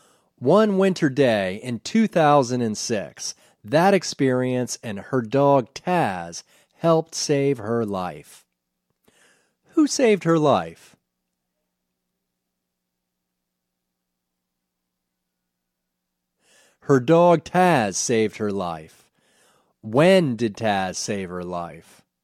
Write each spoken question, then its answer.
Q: When did Taz save her life?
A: Taz saved her life one winter day in 2006.